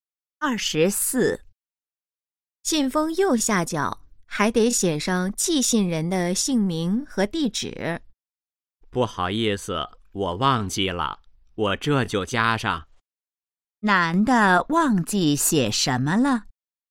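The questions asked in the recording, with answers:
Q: 男的忘记写什么了?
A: 寄信人的姓名和地址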